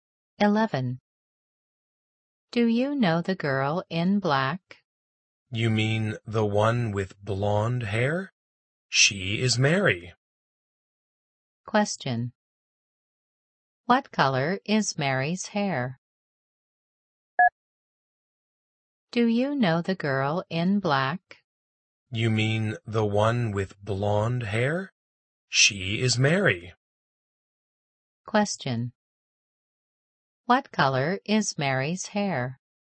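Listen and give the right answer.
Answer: Blonde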